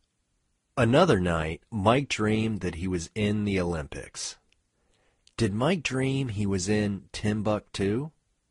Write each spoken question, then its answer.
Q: Did Mike dream he was in Timbuktu?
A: No, Mike didn't dream he was in Timbuktu.